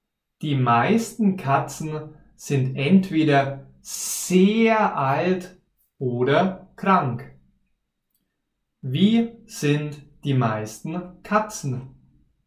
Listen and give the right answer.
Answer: Sehr alt oder krank.